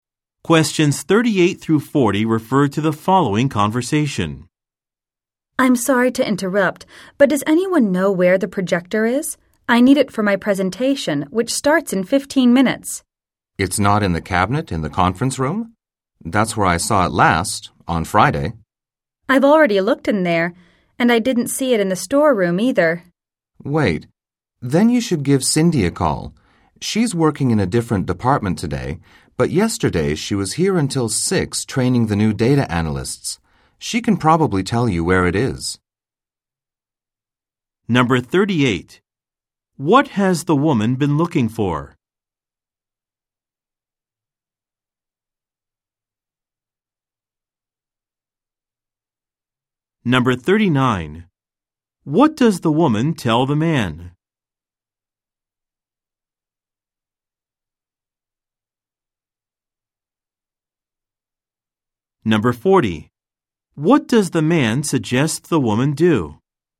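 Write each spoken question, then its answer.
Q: What has the woman been looking for?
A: The projector

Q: What does the man suggest the woman do?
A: Call Cindy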